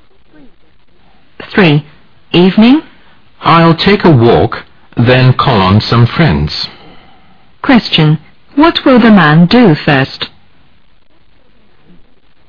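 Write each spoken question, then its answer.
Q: What will the man do first?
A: Take a walk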